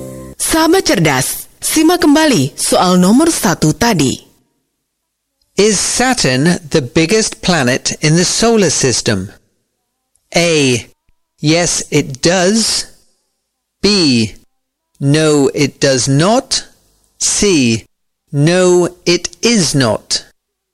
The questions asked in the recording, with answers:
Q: Is Saturn the biggest planet in the solar system?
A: C. No, it is not.